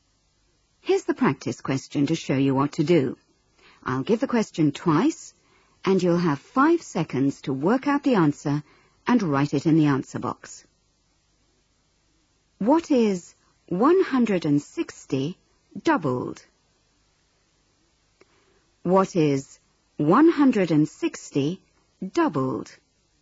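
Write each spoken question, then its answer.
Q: What is 160 doubled?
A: 320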